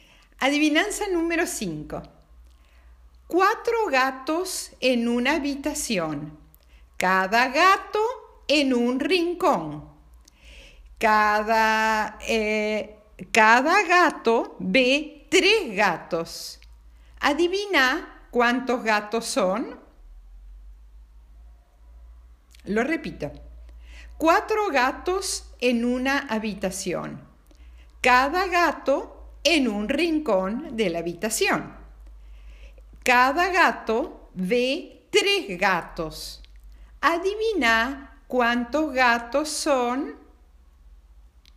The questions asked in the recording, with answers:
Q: Adivina cuántos gatos son.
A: Respuesta cuatro.